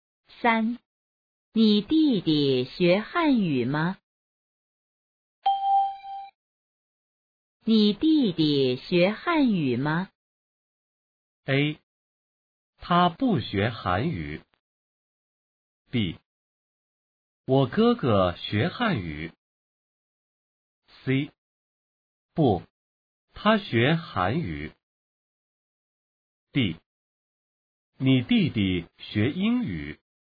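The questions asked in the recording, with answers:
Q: 你弟弟学汉语吗?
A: C: 不,他学韩语。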